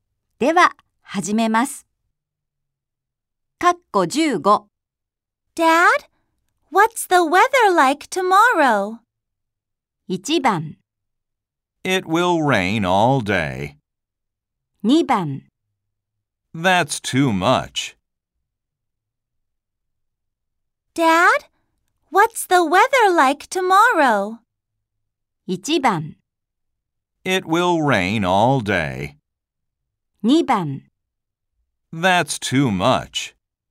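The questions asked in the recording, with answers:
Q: Dad, what's the weather like tomorrow?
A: 1: It will rain all day.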